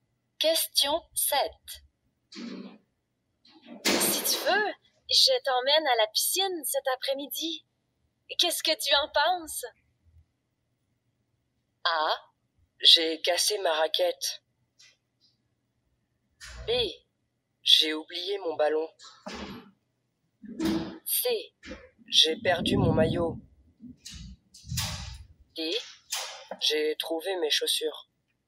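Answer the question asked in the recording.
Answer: C: J'ai perdu mon maillot.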